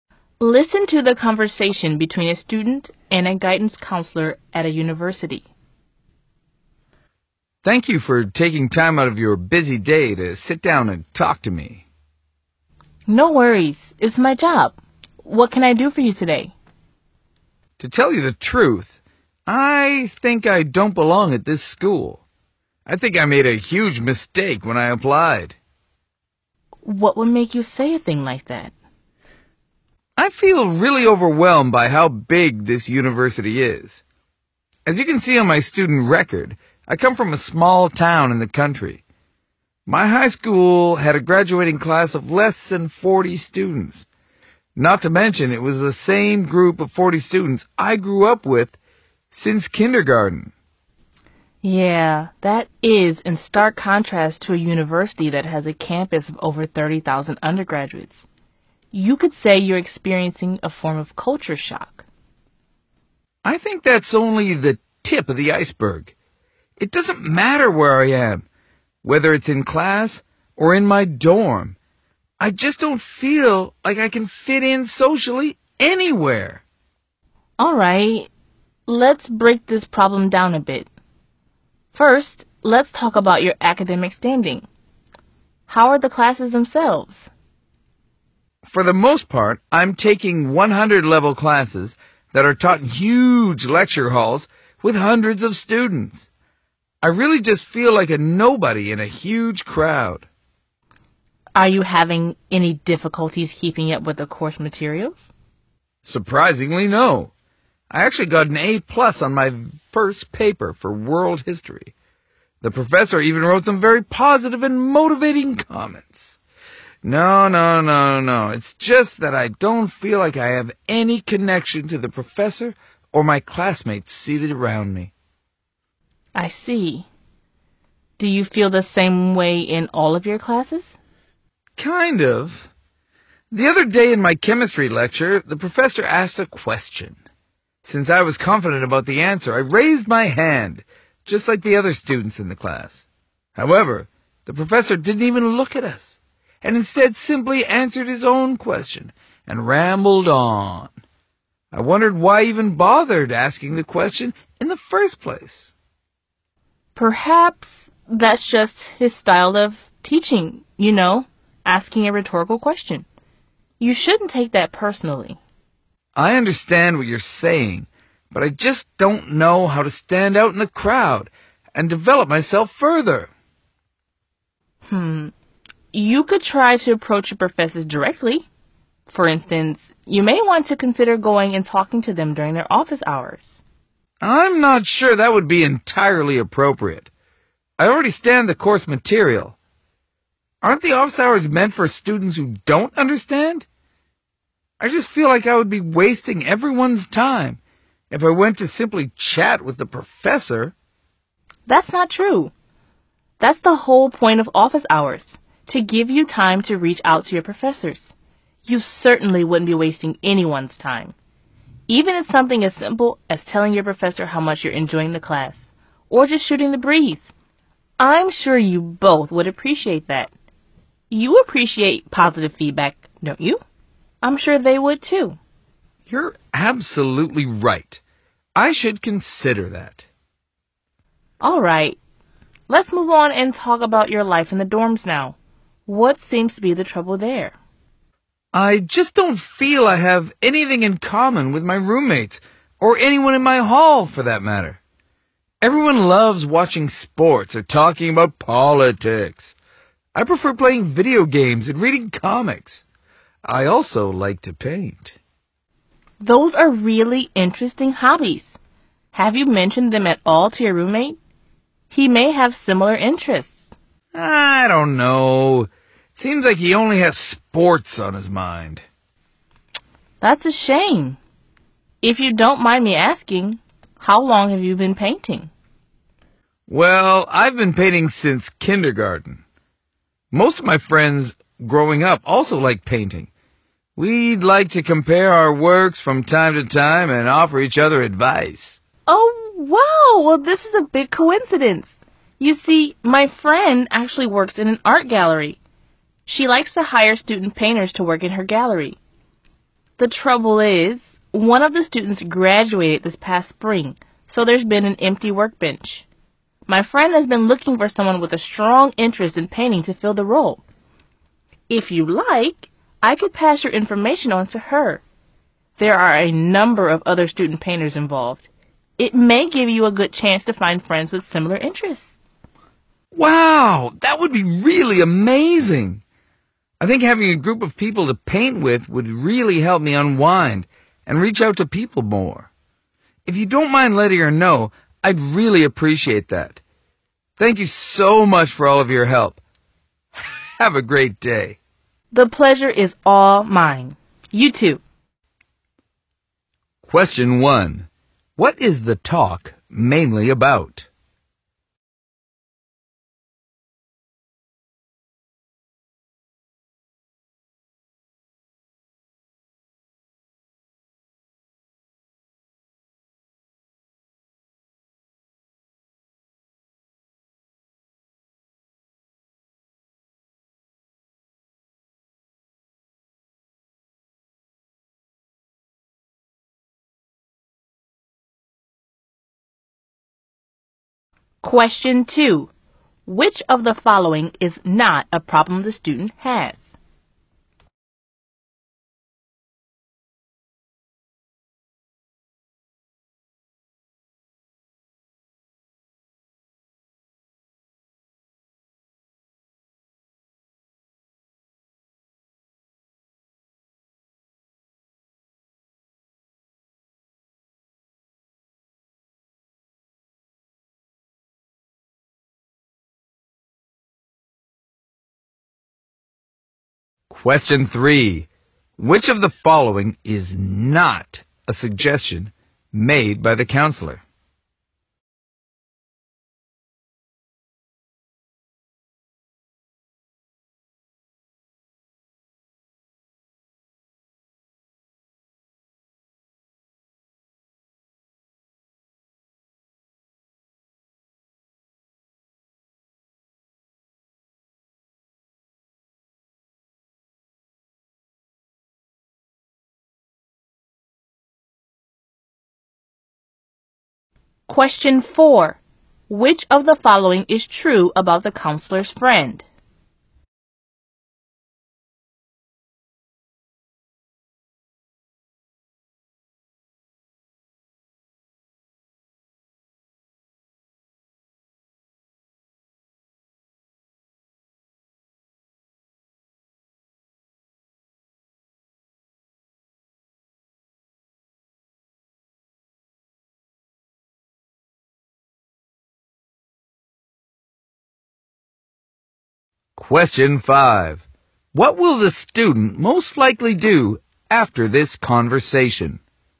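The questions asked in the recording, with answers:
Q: What is the talk mainly about?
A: A student who feels he doesn't fit in socially at a big university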